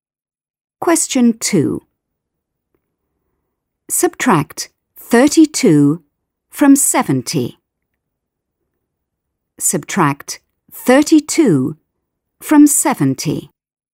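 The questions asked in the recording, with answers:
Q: Subtract 32 from 70.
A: 38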